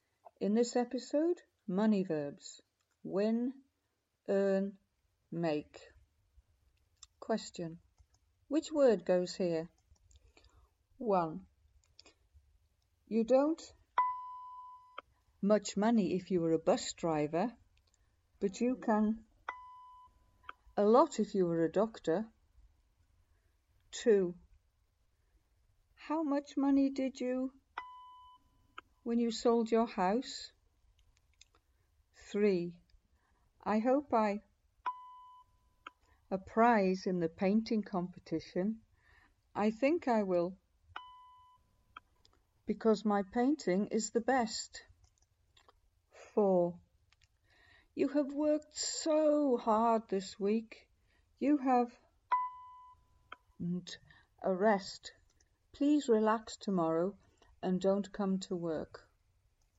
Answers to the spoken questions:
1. You don't earn much money if you were a bus driver, but you can earn a lot if you were a doctor.
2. How much money did you make when you sold your house?
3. I hope I win a prize in the painting competition.
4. you have earned a rest.